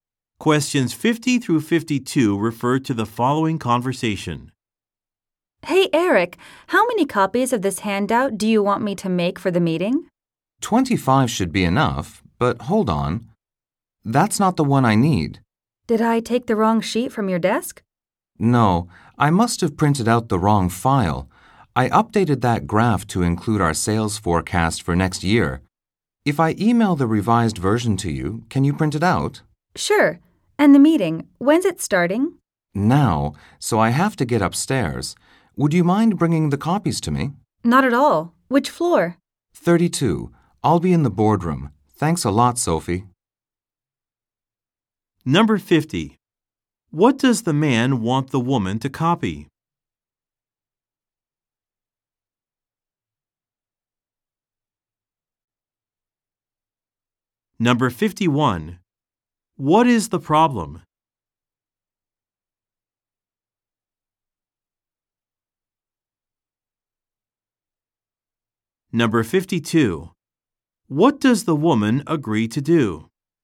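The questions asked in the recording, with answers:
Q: What does the man want the woman to copy?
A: A handout for the meeting

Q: What is the problem?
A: The man printed the wrong file

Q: What does the woman agree to do?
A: Bring the copies to the boardroom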